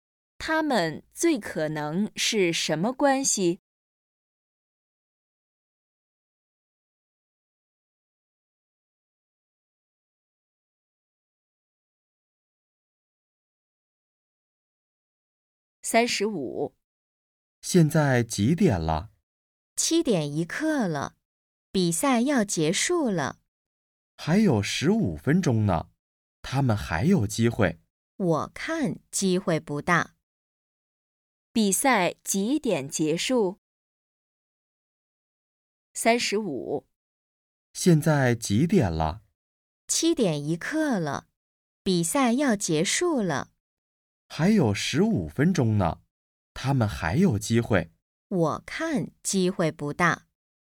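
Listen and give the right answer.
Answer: 7:16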